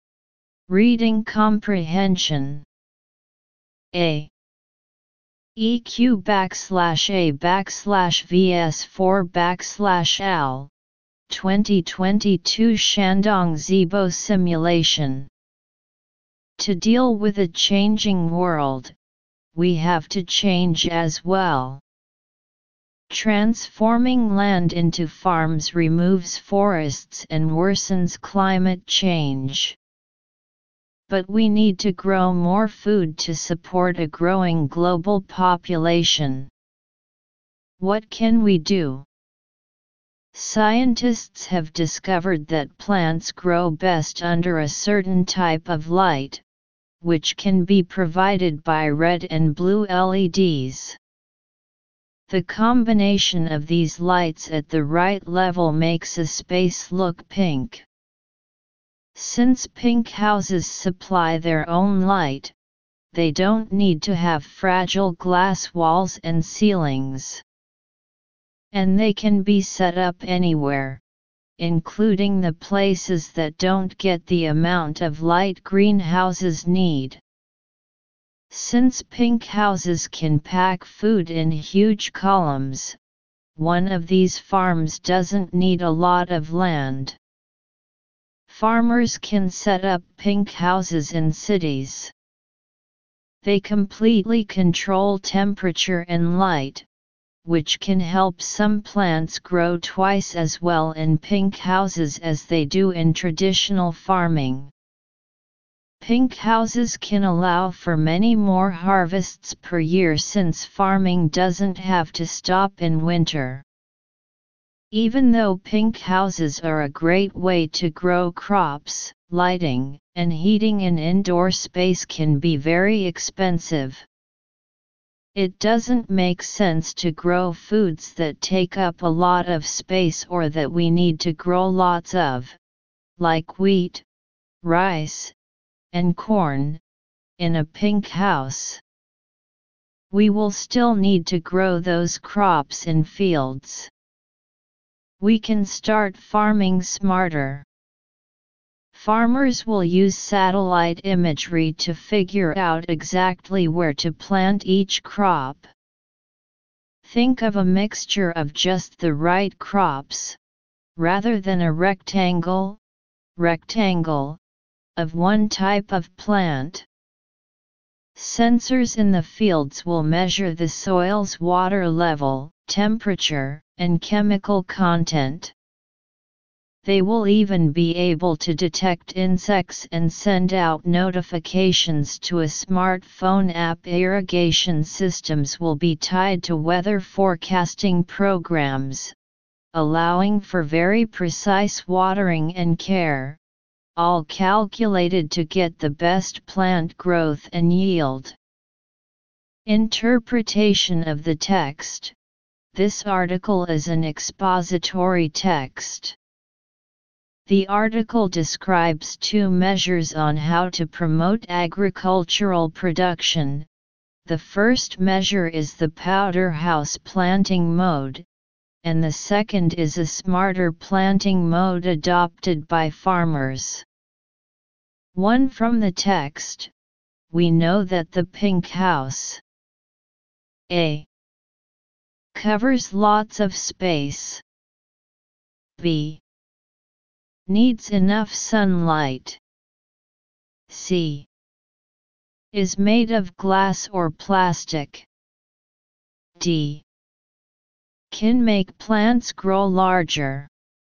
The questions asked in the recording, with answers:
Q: From the text, we know that the pink house A.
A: Choose D